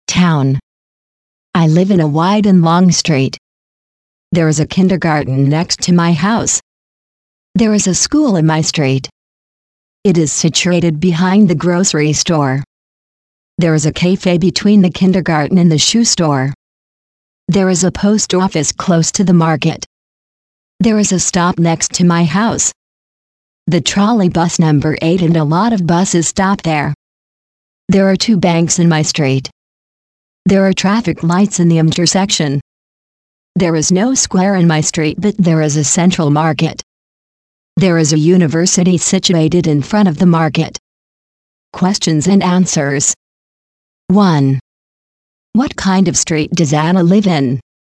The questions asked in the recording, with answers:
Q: What kind of street does Anna live in?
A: Her street is wide and long.